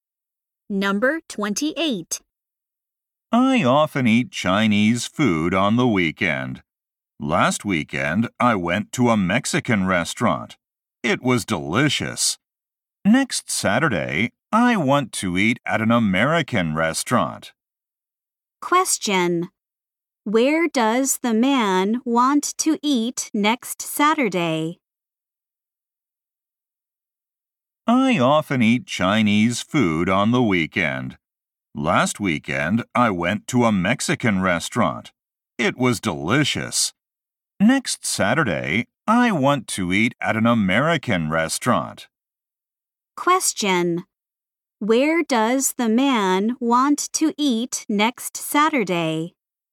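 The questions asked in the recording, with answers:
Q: Where does the man want to eat next Saturday?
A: At an American restaurant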